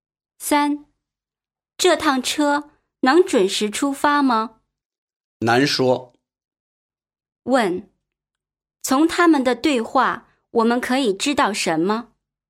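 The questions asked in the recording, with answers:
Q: 问,从他们的对话,我们可以知道什么?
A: 车不一定能准时出发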